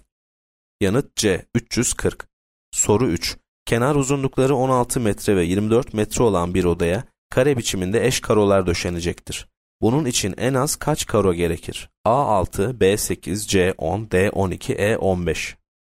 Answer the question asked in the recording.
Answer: Yanıt A 6.